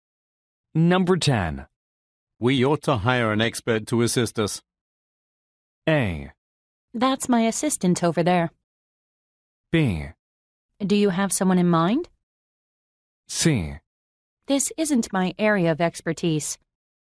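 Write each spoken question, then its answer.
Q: We ought to hire an expert to assist us.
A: B: Do you have someone in mind?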